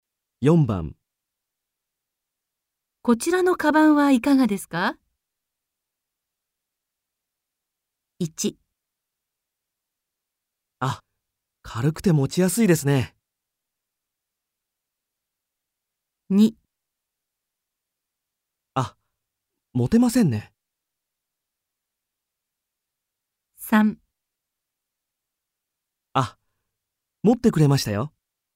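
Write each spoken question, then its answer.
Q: こちらのカバンはいかがですか?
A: 1: あ、軽くて持ちやすいですね。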